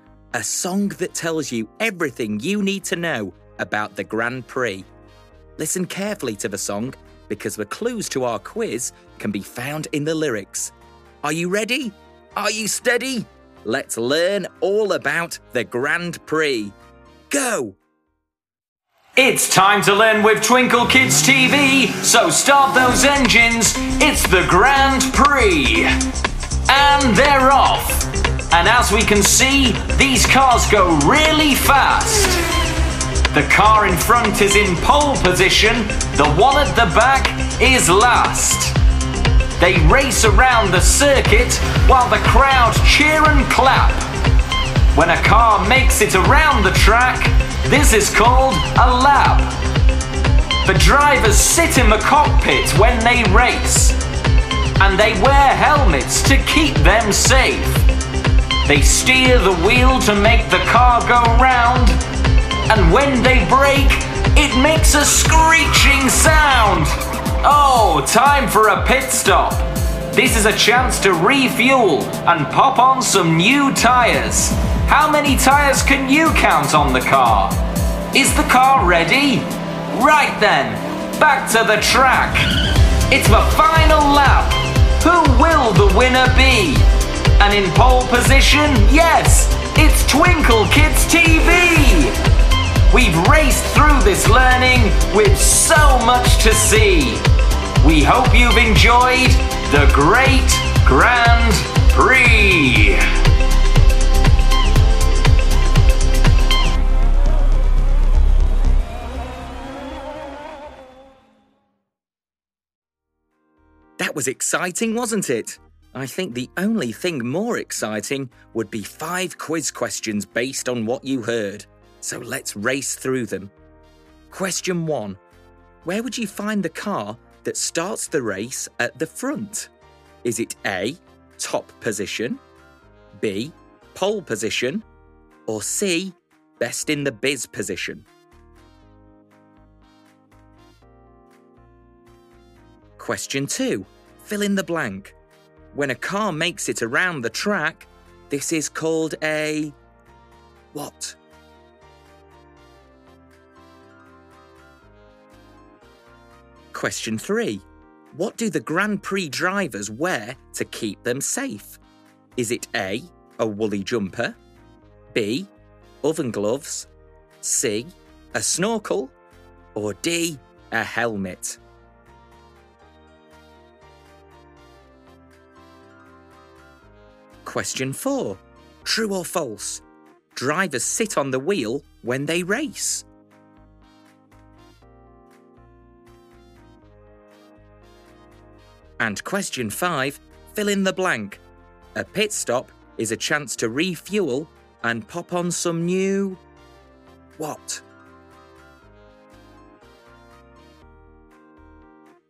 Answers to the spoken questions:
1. The answer is B. Pole position is the name given to the car that begins the Grand Prix at the front.
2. When a car makes it around the track, this is called a lap.
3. So the answer is D, helmet.
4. The answer is false. The drivers sit in the cockpit.
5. A pit stop is a chance to refuel and pop on some new tyres.